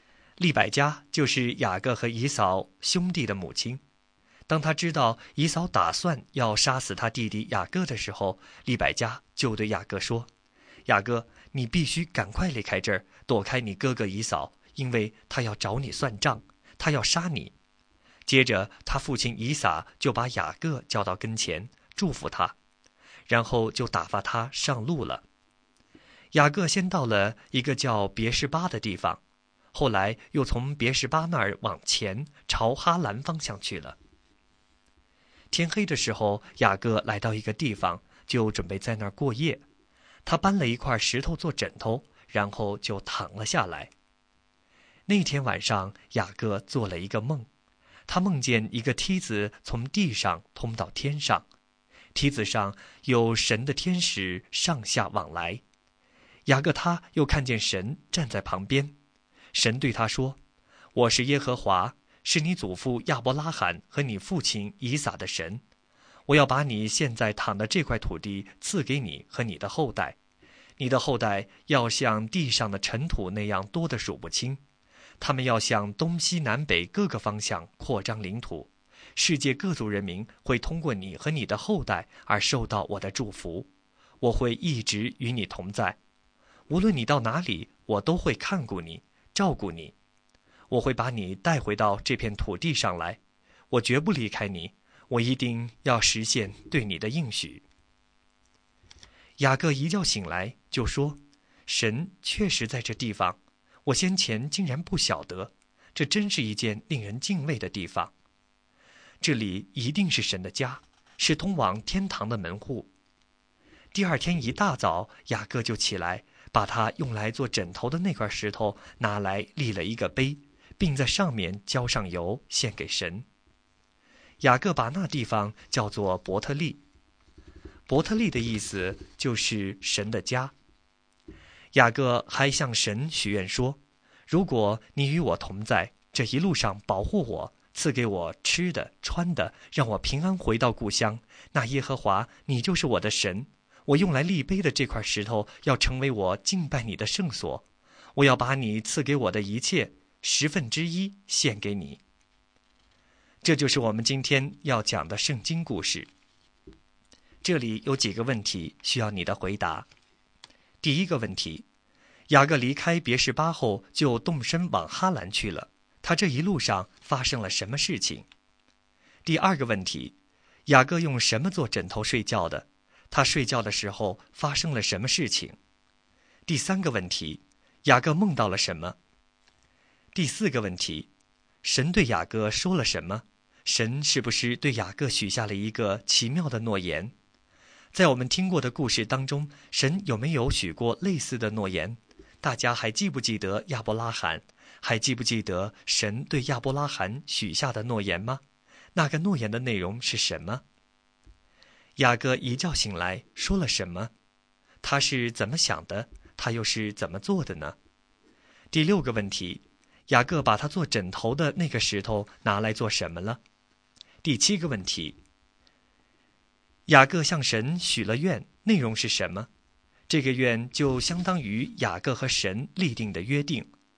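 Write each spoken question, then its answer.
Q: 雅各离开别示巴后就动身往哈兰去了,他这一路上发生了什么事情?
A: 天黑时他在一个地方过夜,用石头做枕头,夜里做了一个梦

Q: 雅各用什么做枕头睡觉的?他睡觉的时候发生了什么事情?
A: 用一块石头做枕头;他睡觉时做了一个梦

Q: 雅各梦到了什么?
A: 梦见一个梯子从地上通到天上,神的天使在上面上下往来,神站在旁边

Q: 神对雅各说了什么?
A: 要把他躺的土地赐给他和他的后代,他的后代多如尘土,万族因他得福,神会与他同在并带他回来

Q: 雅各把他做枕头的那个石头拿来做什么了?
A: 立了一个碑,在上面浇油献给神

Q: 雅各向神许了愿,内容是什么?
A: 如果神与他同在、保护他、供他吃穿、让他平安回乡,耶和华就是他的神,这块石碑要成为敬拜神的圣所,他要把神所赐的十分之一献给神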